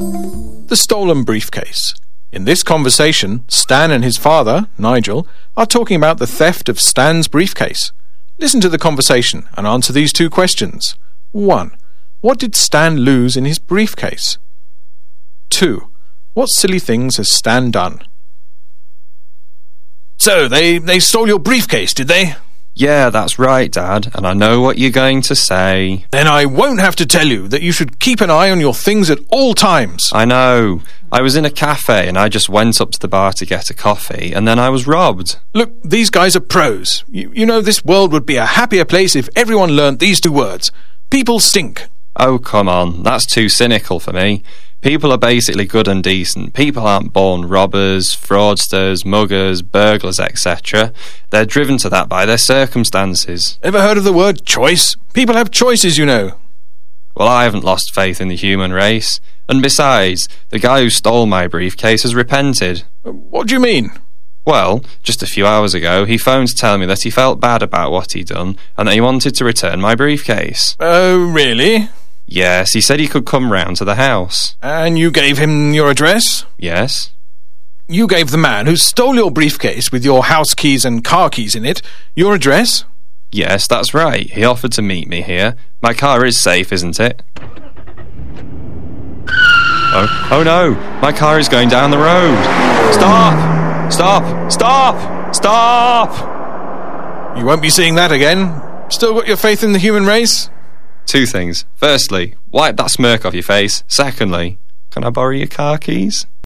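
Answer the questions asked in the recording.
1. His house keys and car keys
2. He left his briefcase unattended in a cafe and gave the thief his address, so his car got stolen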